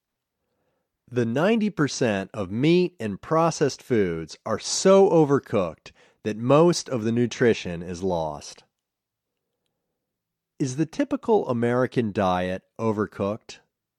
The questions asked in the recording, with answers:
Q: Is the typical American diet overcooked?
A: Yes, the typical American diet is overcooked.